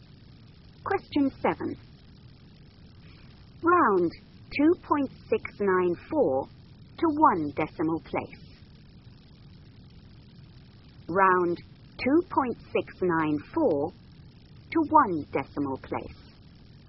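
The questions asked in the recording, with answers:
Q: Round 2.694 to one decimal place.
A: 2.7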